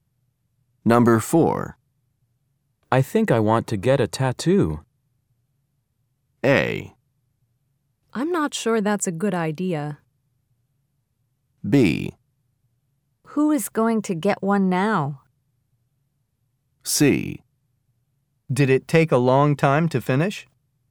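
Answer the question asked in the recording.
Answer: A: I'm not sure that's a good idea.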